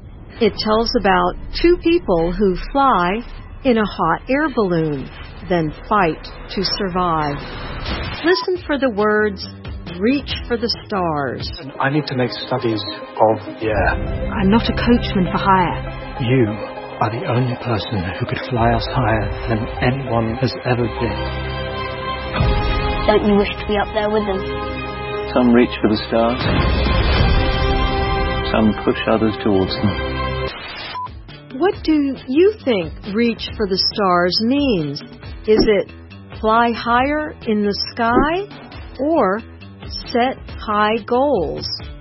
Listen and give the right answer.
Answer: The answer is B, set high goals.